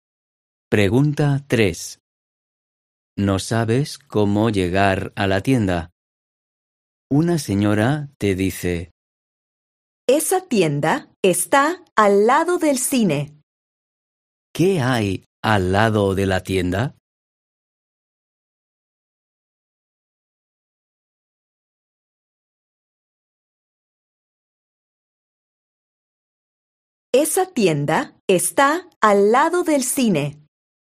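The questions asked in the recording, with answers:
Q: ¿Qué hay al lado de la tienda?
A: el cine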